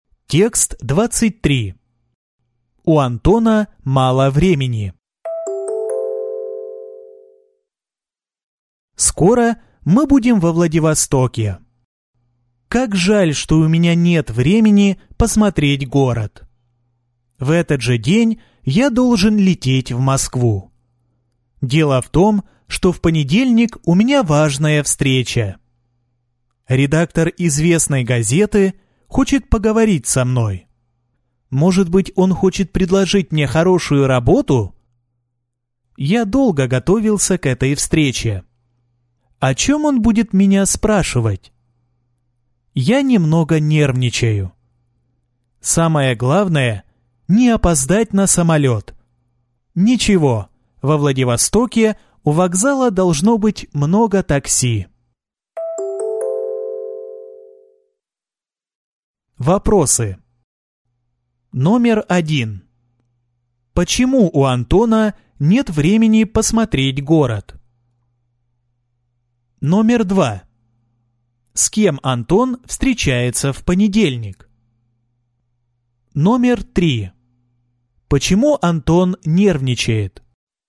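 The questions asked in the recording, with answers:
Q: Почему у Антона нет времени посмотреть город?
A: В этот же день он должен лететь в Москву: в понедельник у него важная встреча

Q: С кем Антон встречается в понедельник?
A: С редактором известной газеты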